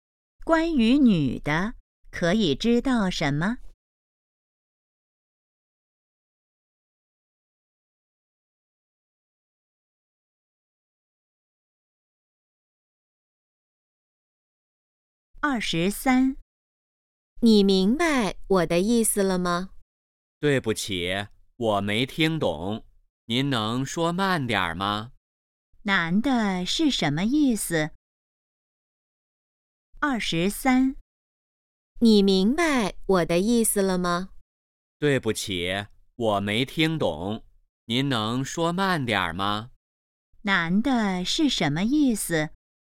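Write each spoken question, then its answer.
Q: 男的是什么意思?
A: 没听懂,希望对方说慢点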